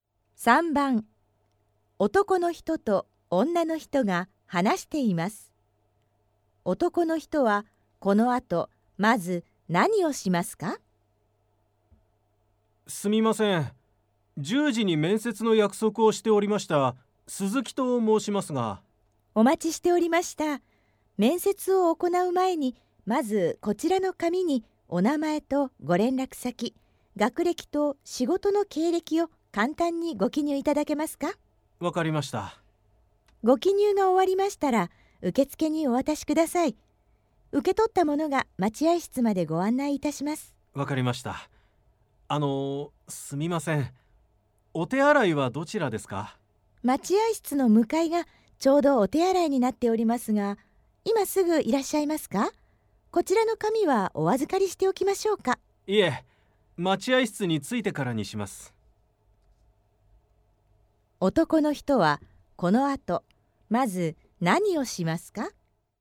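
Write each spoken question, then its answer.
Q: 男の人はこの後まず何をしますか?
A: 紙に名前や連絡先、学歴、仕事の経歴を記入する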